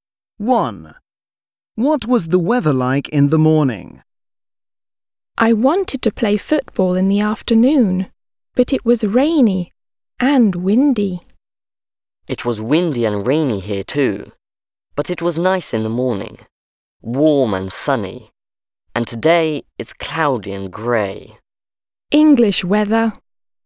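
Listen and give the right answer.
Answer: warm and sunny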